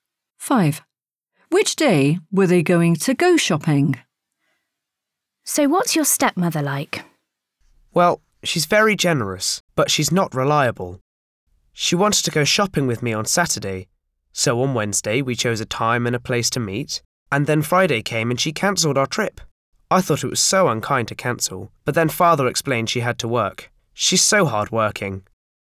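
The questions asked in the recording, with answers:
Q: Which day were they going to go shopping?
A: Saturday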